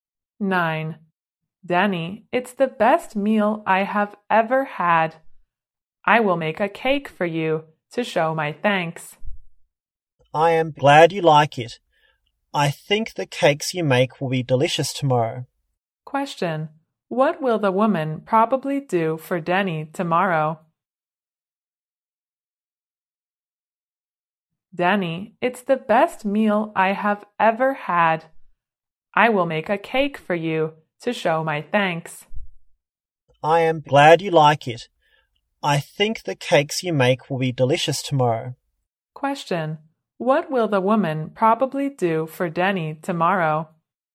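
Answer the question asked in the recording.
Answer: Make a cake for him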